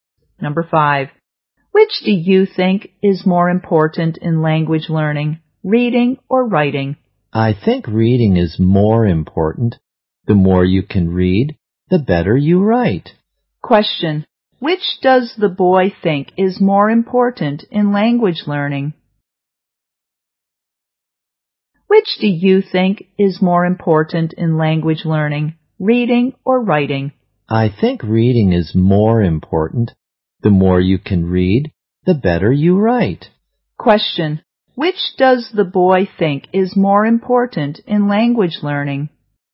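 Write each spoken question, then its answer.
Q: which does the boy think is more important in language learning?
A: Reading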